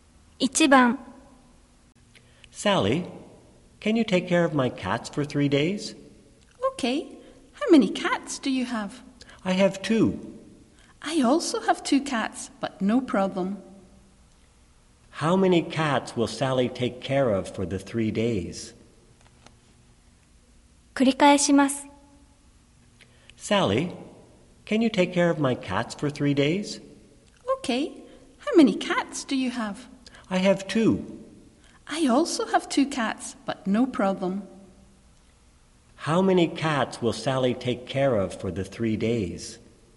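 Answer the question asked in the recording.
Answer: Four (her own two and the other person's two)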